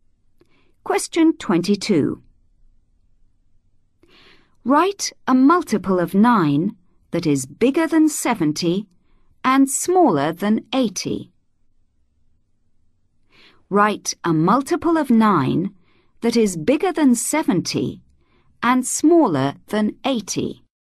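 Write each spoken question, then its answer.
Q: Write a multiple of 9 that is bigger than 70 and smaller than 80.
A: 72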